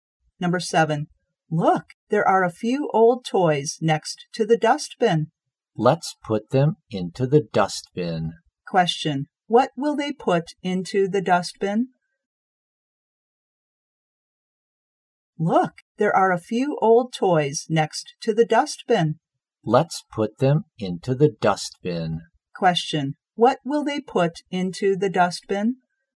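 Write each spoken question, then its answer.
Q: what will they put into the dustbin?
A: Old toys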